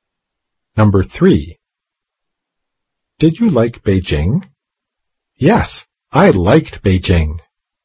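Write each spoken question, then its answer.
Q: Did you like Beijing?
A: Right (green card): "Yes, I liked Beijing."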